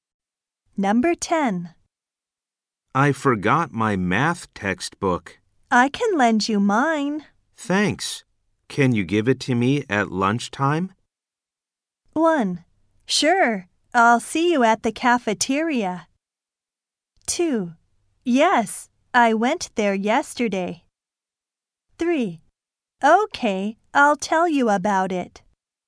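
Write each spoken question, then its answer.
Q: Thanks. Can you give it to me at lunchtime?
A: 1: Sure. I'll see you at the cafeteria.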